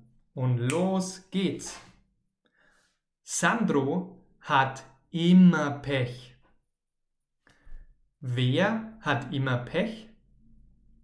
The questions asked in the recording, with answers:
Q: Wer hat immer Pech?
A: Sandro. Sandro hat immer Pech.